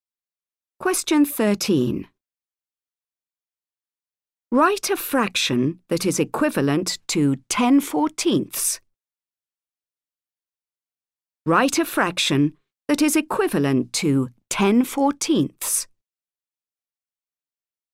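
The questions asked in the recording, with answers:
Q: Write a fraction that is equivalent to 10/14.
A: 5/7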